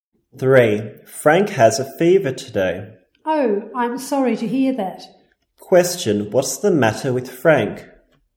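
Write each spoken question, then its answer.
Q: What's the matter with Frank?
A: He has a fever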